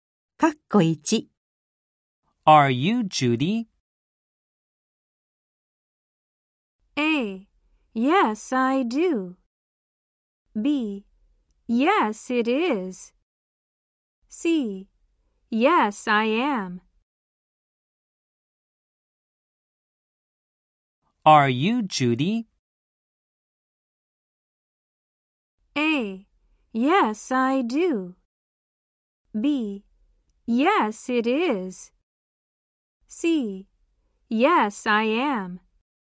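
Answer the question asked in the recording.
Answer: C: Yes, I am.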